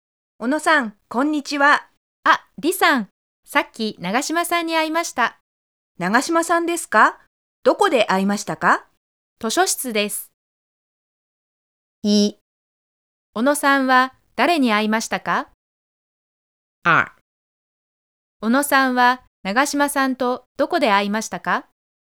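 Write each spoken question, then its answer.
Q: 小野さんは誰に会いましたか?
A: 長島さん

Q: 小野さんは長島さんとどこで会いましたか?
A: 図書室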